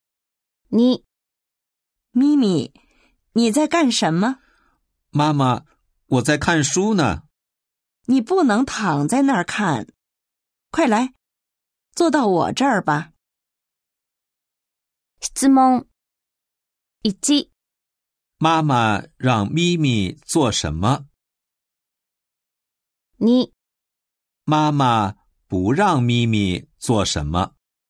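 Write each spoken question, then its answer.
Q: 妈妈让咪咪做什么?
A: 坐到妈妈那儿

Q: 妈妈不让咪咪做什么?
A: 躺着看书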